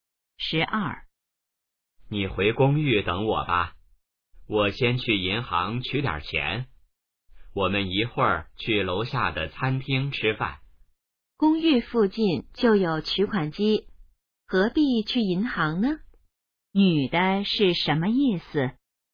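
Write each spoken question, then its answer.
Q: 女的是什么意思?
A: 不必去银行,公寓附近有取款机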